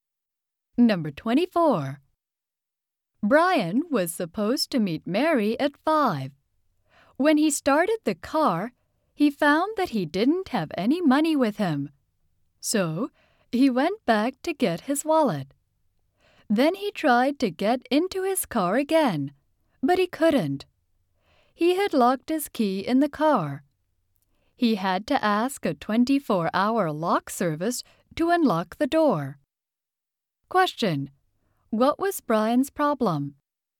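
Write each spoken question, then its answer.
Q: What was Brian's problem?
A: He locked his key in the car.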